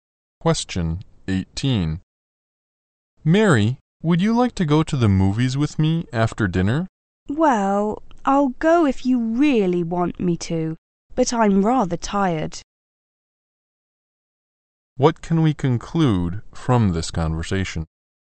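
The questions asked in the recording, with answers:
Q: What can we conclude from this conversation?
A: Mary is tired and doesn't really want to go to the movies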